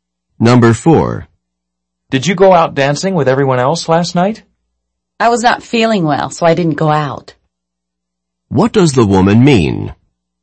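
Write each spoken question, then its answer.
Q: What does the woman mean?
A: She didn't go out because she was sick.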